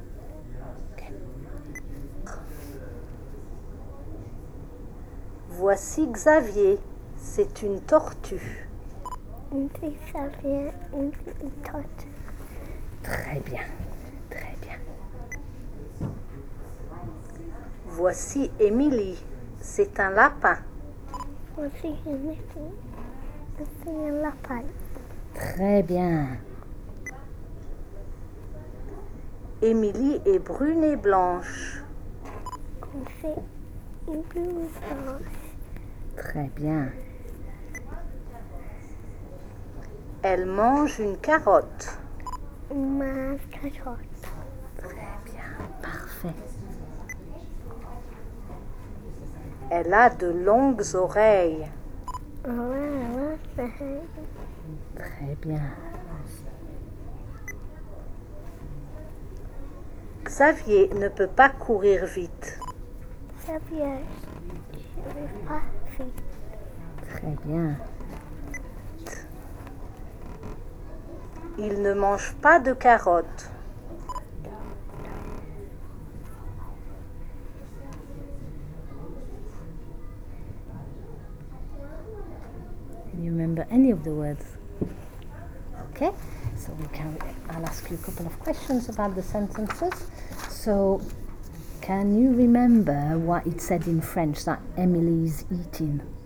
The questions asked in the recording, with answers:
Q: So can you remember what it said in French that Emily is eating?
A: A carrot.